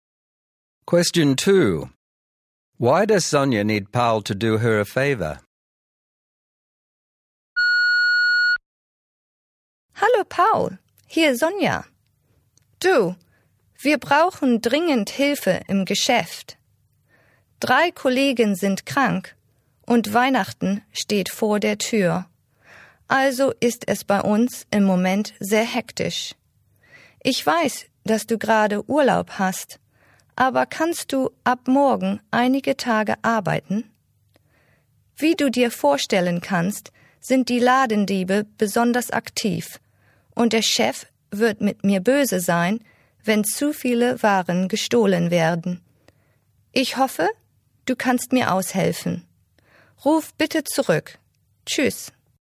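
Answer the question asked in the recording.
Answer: Three colleagues are sick, it is hectic before Christmas, and shoplifters are active, so she needs him to work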